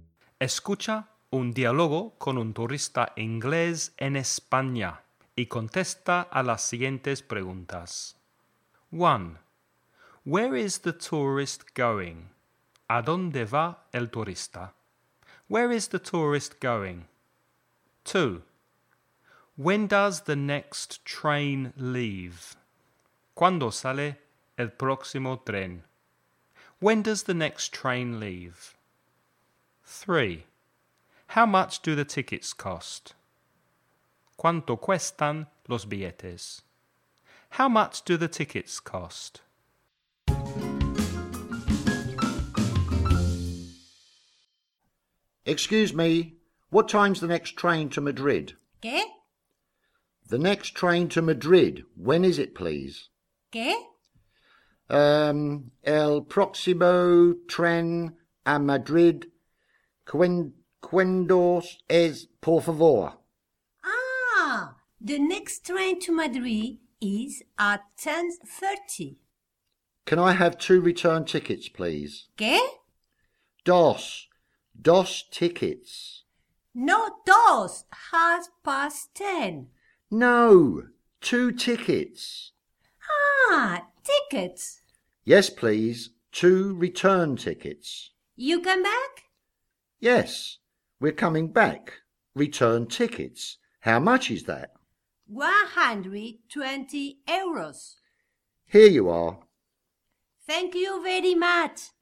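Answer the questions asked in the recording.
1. To Madrid
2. At 10:30
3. 120 euros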